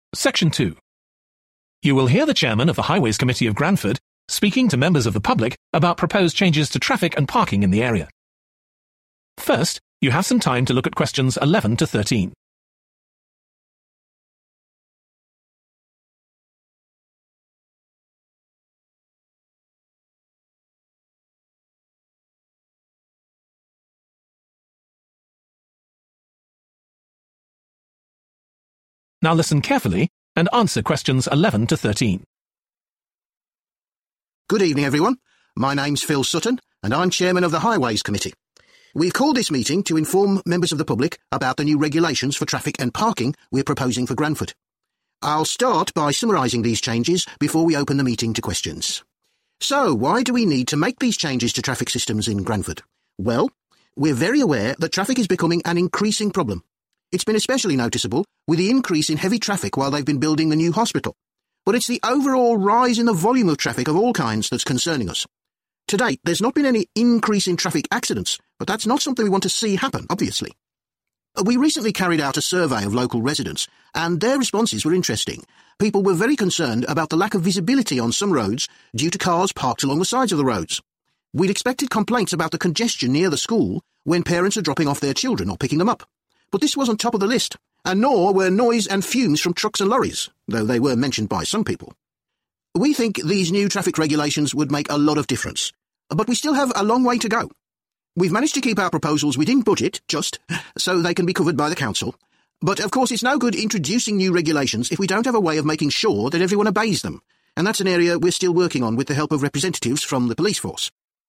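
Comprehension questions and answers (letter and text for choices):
Choose the correct letter, A, B or C.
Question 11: Why are changes needed to traffic systems in Granford?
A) The number of traffic accidents has risen.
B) The amount of traffic on the roads has increased.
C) The types of vehicles on the roads have changed.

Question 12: In a survey, local residents particularly complained about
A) dangerous driving by parents.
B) pollution from trucks and lorries.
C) inconvenience from parked cars.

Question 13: According to the speaker, one problem with the new regulations will be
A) raising money to pay for them.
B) finding a way to make people follow them.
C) getting the support of the police.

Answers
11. B) The amount of traffic on the roads has increased.
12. C) inconvenience from parked cars.
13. B) finding a way to make people follow them.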